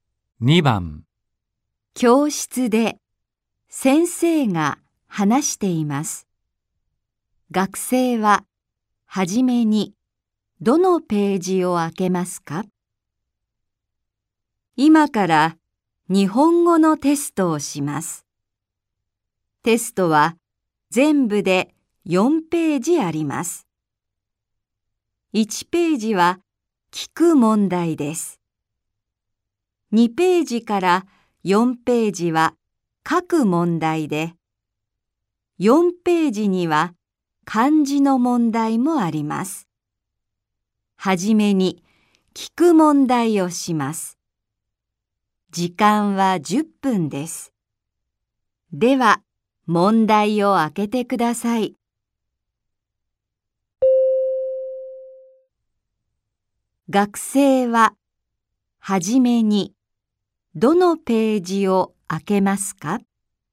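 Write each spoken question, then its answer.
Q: 学生は、はじめに、どのページを開けますか?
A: 1ページ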